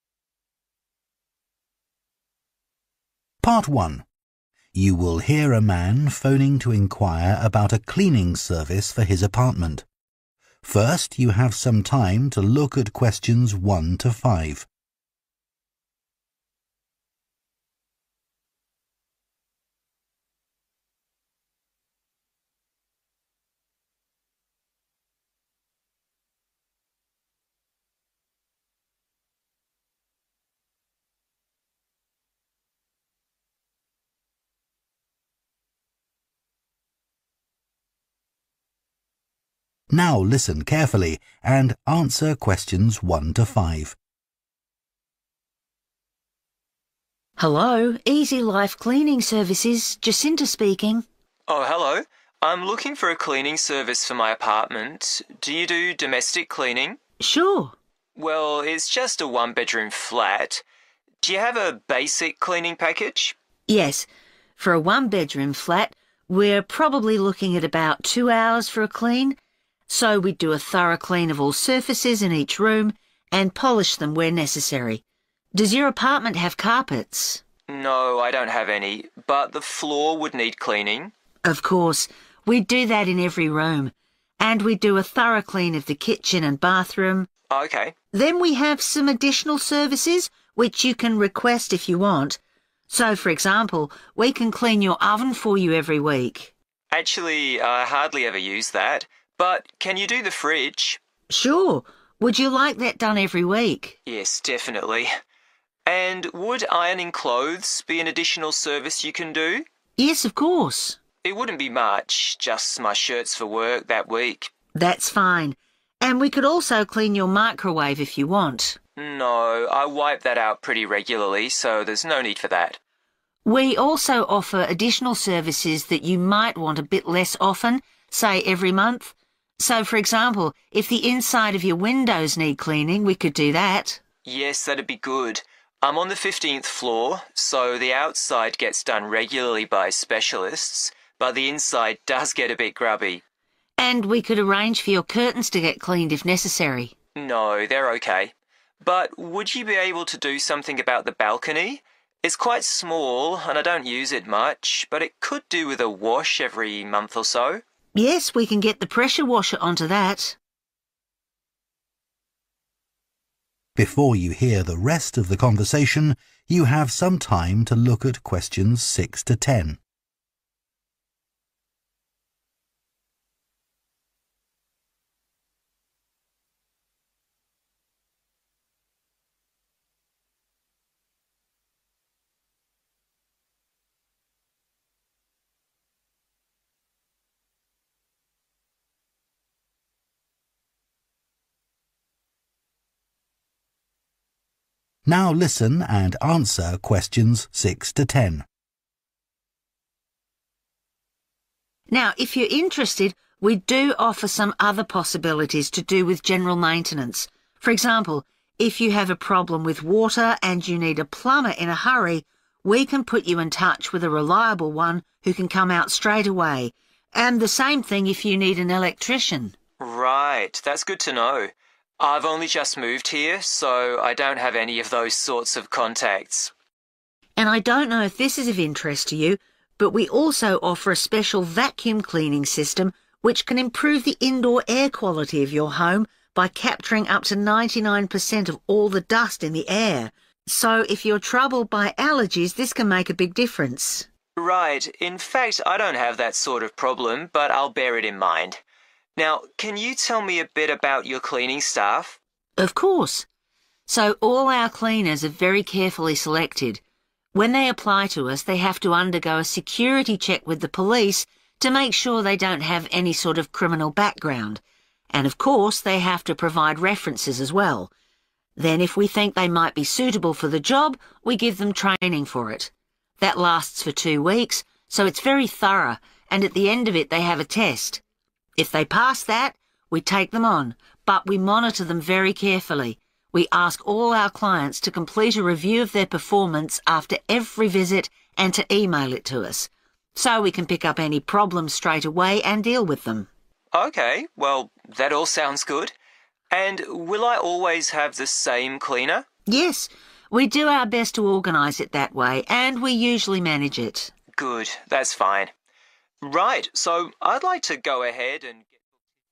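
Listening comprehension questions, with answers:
Complete the notes below.Write ONE WORD AND/OR A NUMBER for each answer.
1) Cleaning the 1 .... throughout the apartment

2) Cleaning the 2 ....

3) Ironing clothes - 3 .... only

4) Cleaning all the 4 ..... from the inside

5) Washing down the 5 ....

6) They can organise a plumber or an 6 ...... if necessary.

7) A special cleaning service is available for customers who are allergic to 7 .....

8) Before being hired, all cleaners have a background check carried out by the 8 ...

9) All cleaners are given 9 ..... for two weeks.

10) Customers send a 10 ...... after each visit.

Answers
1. floor
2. fridge
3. shirts
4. windows
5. balcony
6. electrician
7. dust
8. police
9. training
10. review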